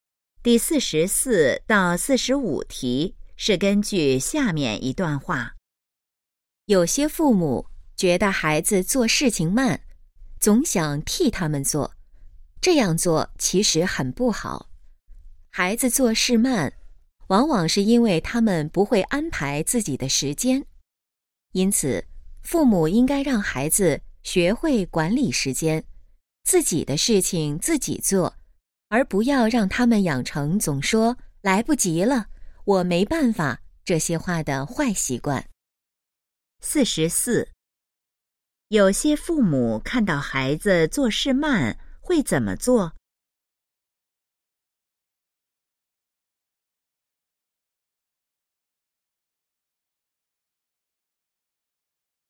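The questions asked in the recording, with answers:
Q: 有些父母看到孩子做事慢会怎么做?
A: 替他们做

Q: 根据这段话,应让孩子养成什么好习惯?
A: 管理时间,自己的事情自己做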